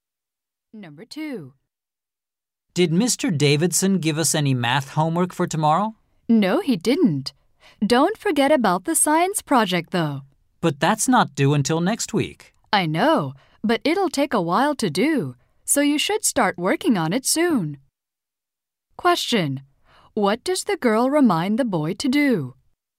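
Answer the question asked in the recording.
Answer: Start working on the science project soon.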